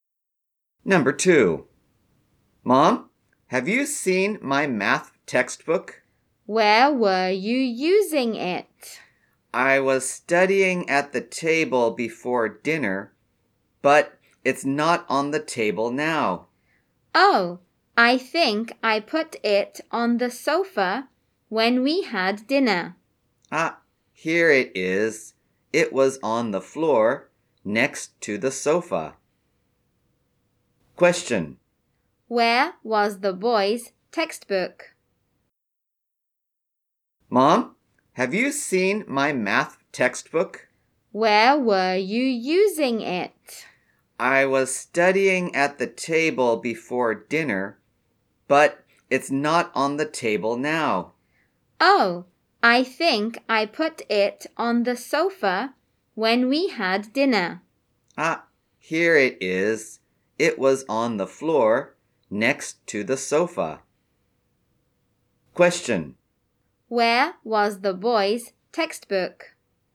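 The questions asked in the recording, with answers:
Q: Where was the boy's textbook?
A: On the floor next to the sofa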